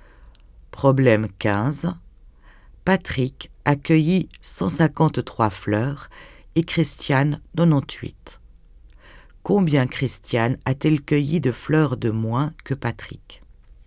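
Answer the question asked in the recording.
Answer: 55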